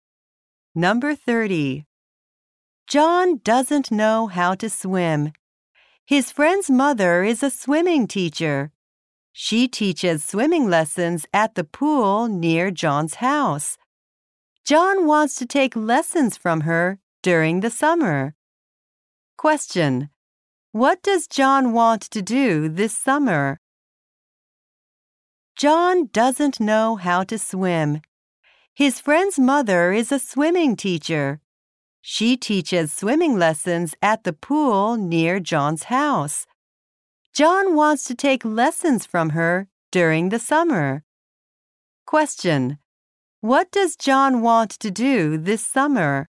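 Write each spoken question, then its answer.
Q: What does John want to do this summer?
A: Take swimming lessons.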